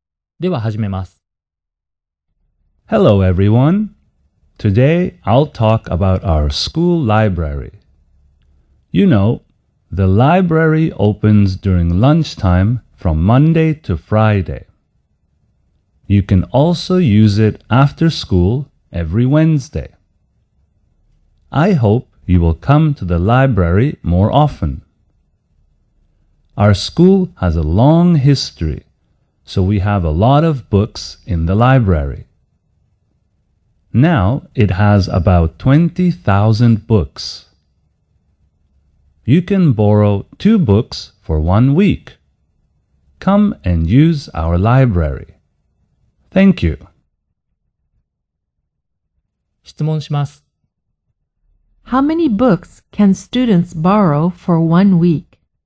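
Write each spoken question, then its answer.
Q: How many books can students borrow for 1 week?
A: Two books.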